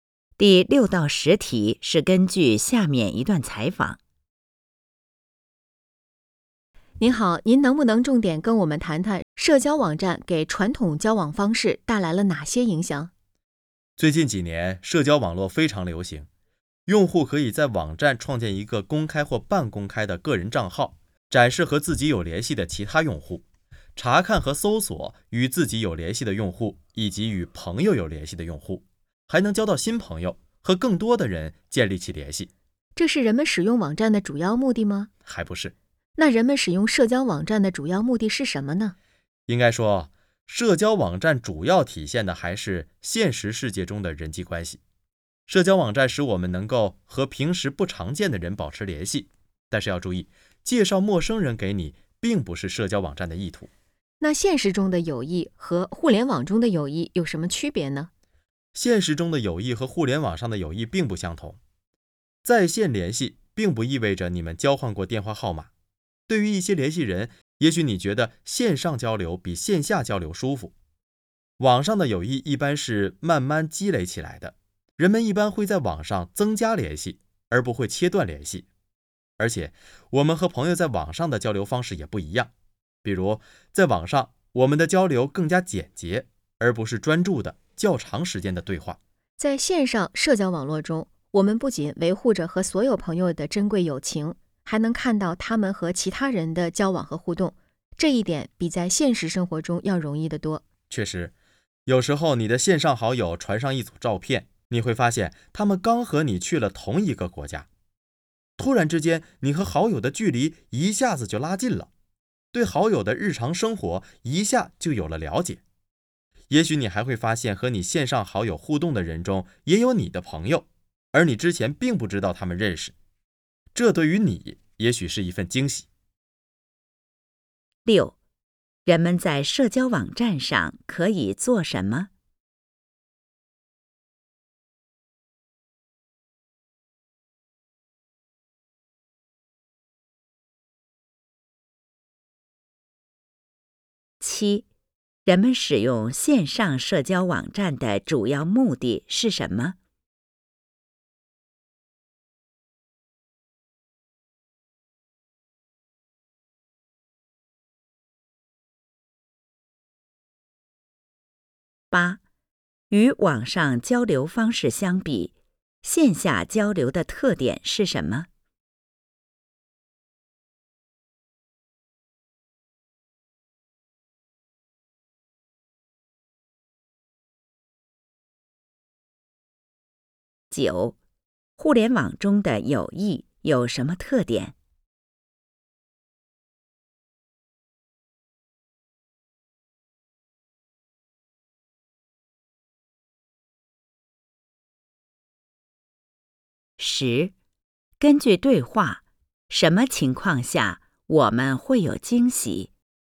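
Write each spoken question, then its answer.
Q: 人们在社交网站上可以做什么?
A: 创建个人账号,查看和搜索有联系的用户,交新朋友

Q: 人们使用线上社交网站的主要目的是什么?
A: 维持现实世界中的人际关系,和平时不常见的人保持联系

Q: 与网上交流方式相比,线下交流的特点是什么?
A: 更专注、对话时间较长

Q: 互联网中的友谊有什么特点?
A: 一般是慢慢积累起来的

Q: 根据对话,什么情况下我们会有惊喜?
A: 发现和线上好友互动的人中也有自己的朋友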